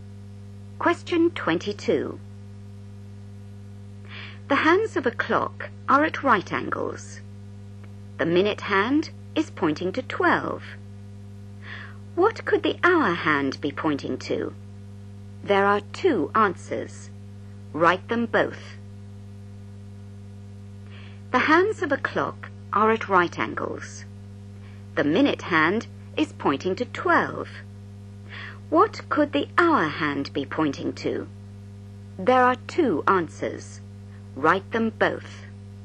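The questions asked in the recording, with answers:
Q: What could the hour hand be pointing to?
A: 3 or 9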